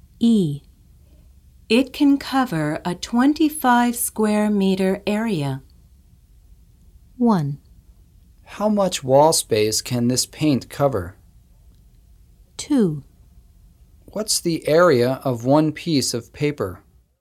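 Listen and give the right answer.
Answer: 1: How much wall space can this paint cover?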